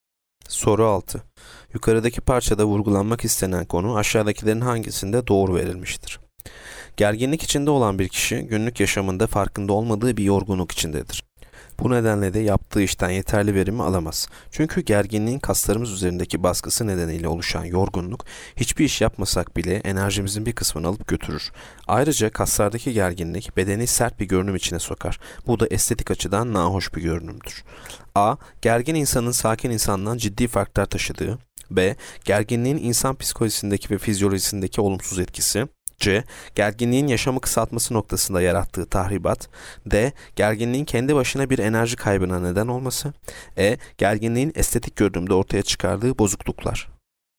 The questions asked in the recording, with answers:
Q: Yukarıdaki parçada vurgulanmak istenen konu aşağıdakilerin hangisinde doğru verilmiştir?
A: Yanıt B. Gerginliğin insan psikolojisindeki ve fizyolojisindeki olumsuz etkisi.